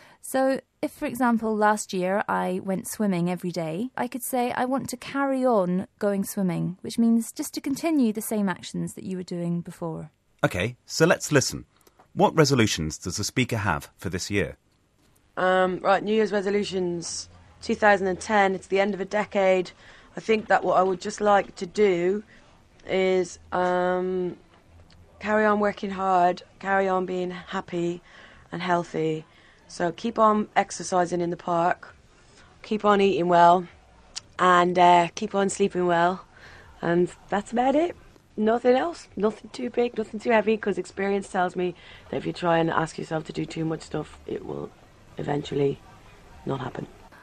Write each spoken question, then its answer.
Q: What resolutions does the speaker have for this year?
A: she wants to carry on or continue what she's already been doing